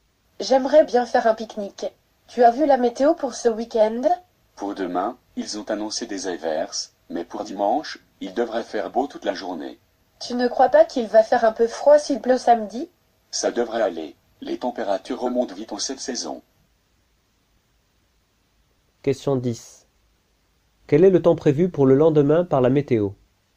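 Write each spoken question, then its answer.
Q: Quel est le temps prévu pour le lendemain par la météo?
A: Des averses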